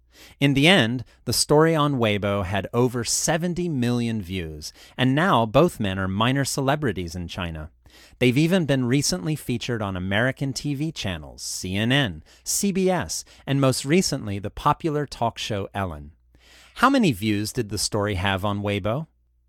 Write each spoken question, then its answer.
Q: How many views did the story have on Weibo?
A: It had over 70 million views.